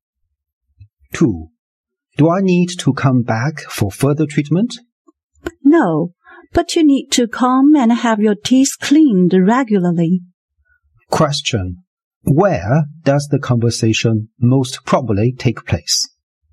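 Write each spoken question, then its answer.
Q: Where does the conversation most probably take place?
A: At a dentist's office.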